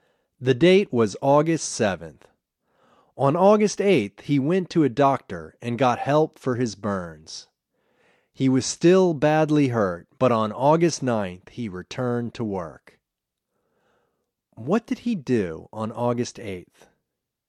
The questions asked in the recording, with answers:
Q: What did he do on August 8th?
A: He went to a doctor and got help for his burns on August 8th.